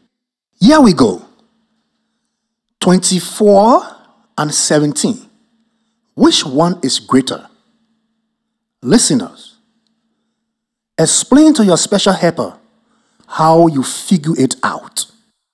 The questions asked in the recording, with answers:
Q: 24 and 17. Which one is greater?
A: I think 24 is more than 17.